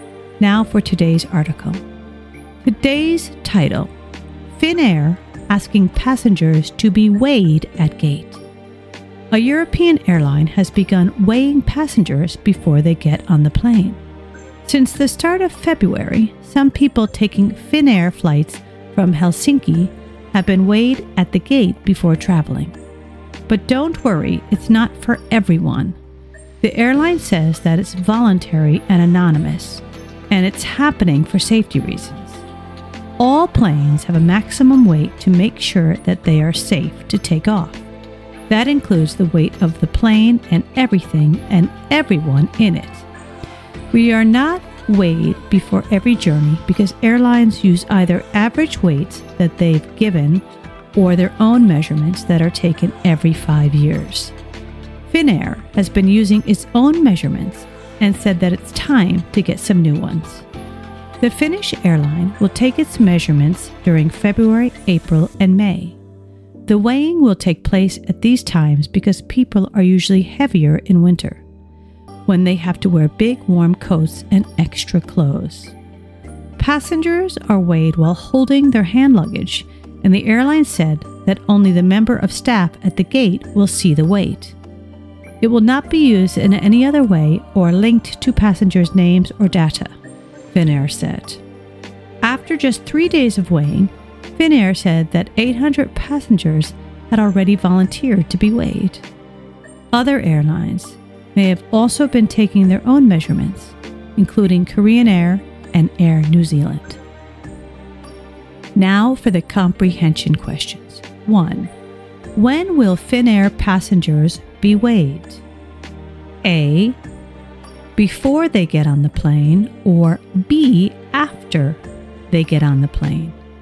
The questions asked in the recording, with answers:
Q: When will Finnair passengers be weighed?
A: before they get on the plane.